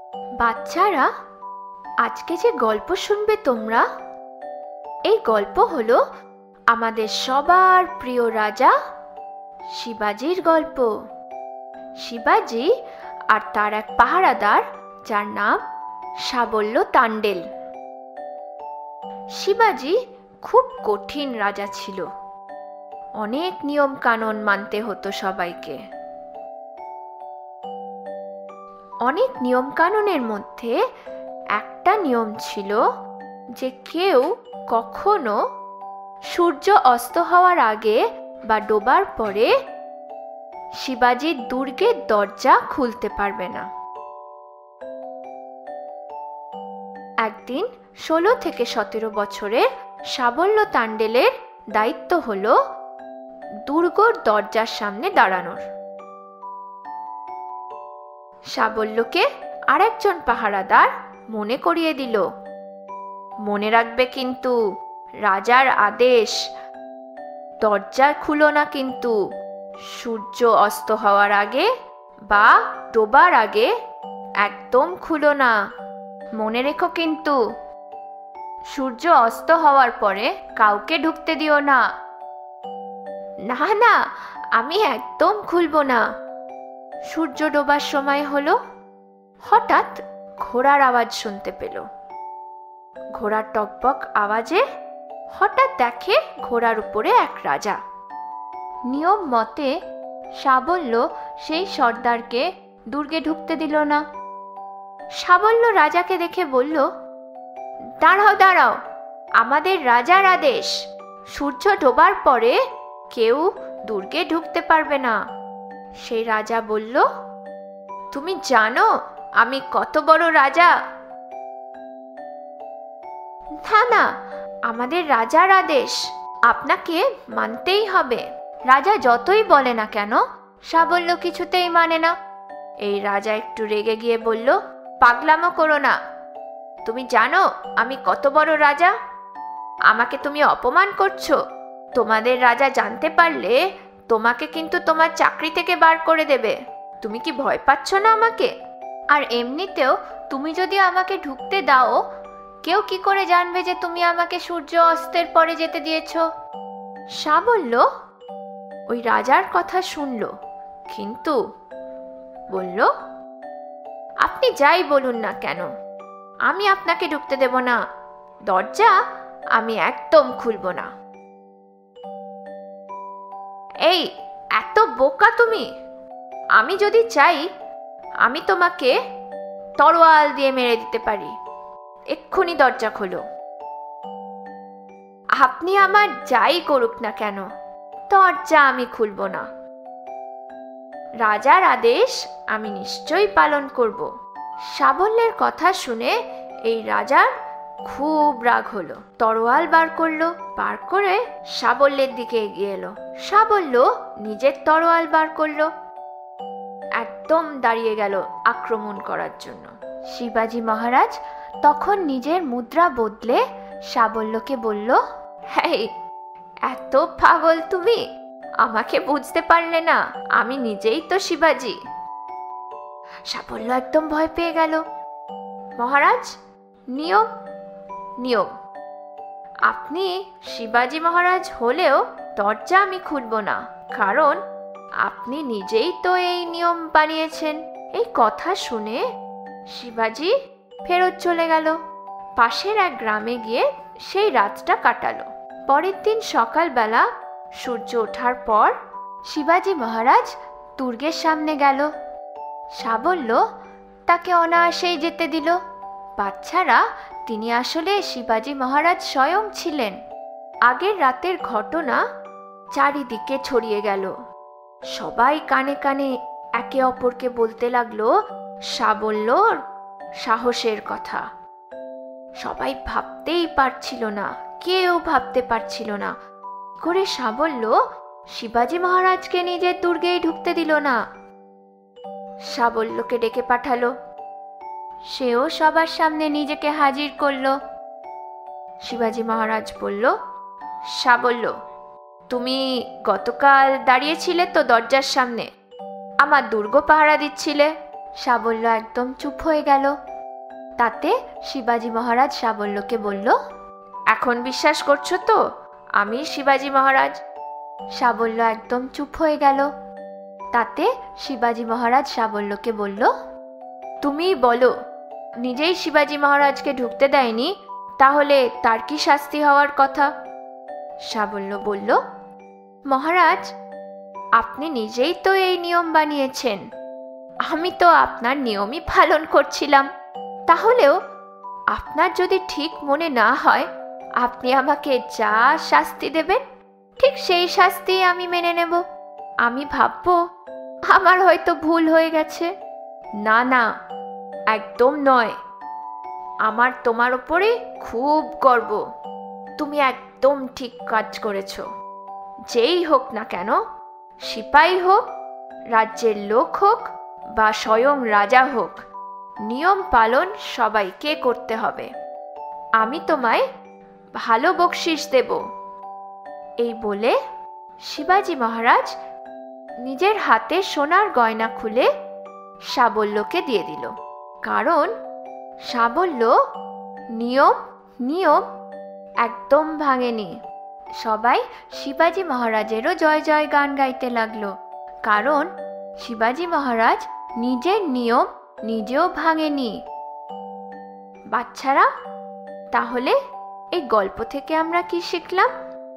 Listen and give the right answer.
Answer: যে কোনো নিয়ম যেই বানাক না কেন পালন করো। যদি নিজেও কোনো নিয়ম বানিয়ে থাকো তাহলে সেটা নিজেদের জন্যও উপযোগ করো।